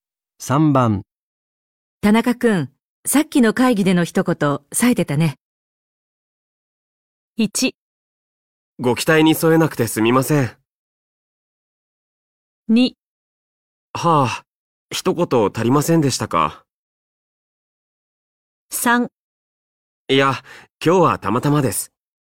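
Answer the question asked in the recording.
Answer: 3: いや、今日はたまたまです。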